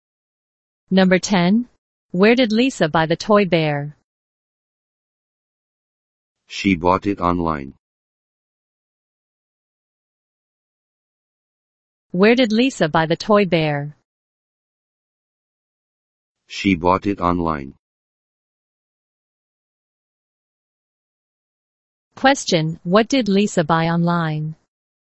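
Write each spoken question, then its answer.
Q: Question, what did Lisa buy online?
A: A toy bear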